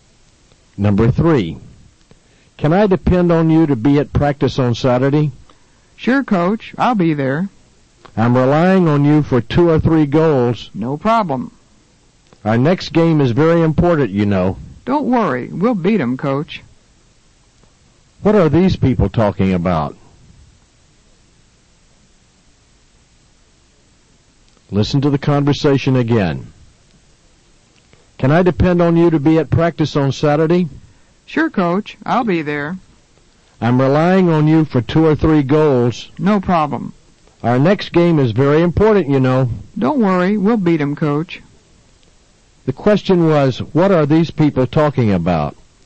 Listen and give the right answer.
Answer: They are talking about an important game.